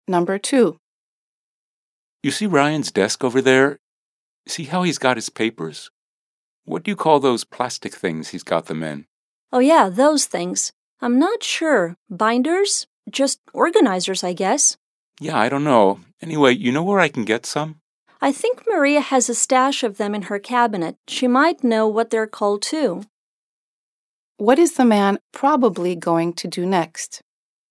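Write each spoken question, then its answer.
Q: What is the man probably going to do next?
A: Go ask Maria for some of the plastic organizers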